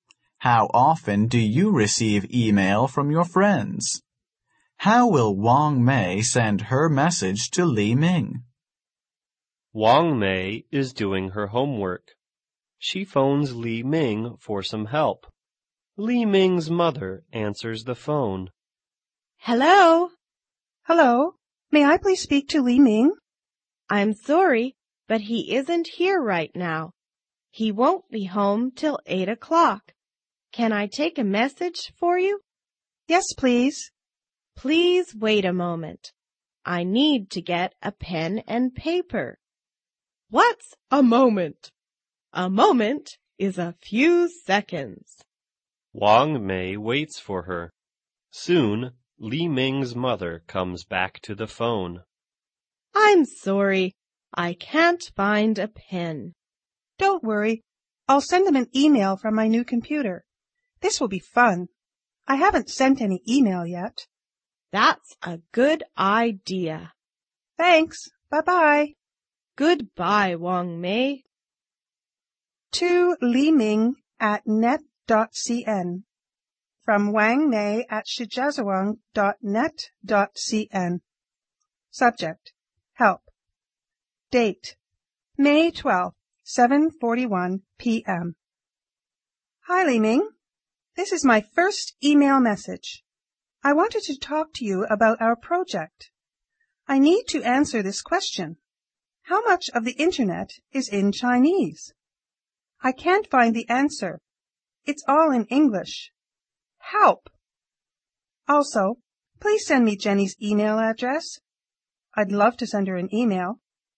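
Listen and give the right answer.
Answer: By email, from her new computer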